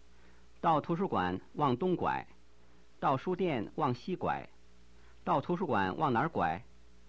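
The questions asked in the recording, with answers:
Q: 到图书馆往哪儿拐?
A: 往东拐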